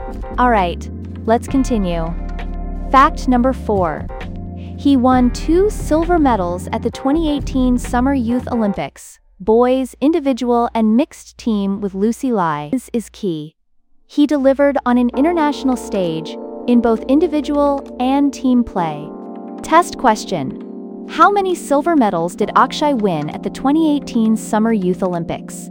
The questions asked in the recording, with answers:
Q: How many silver medals did Akshay win at the 2018 Summer Youth Olympics?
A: Correct answer. 2.